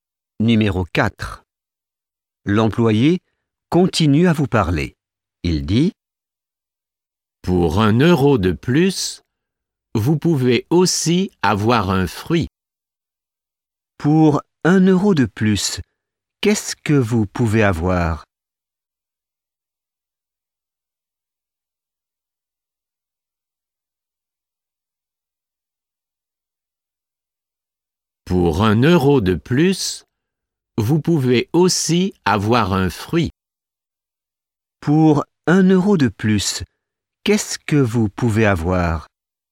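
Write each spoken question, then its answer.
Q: Pour 1 euro de plus, qu'est-ce que vous pouvez avoir ?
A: Un fruit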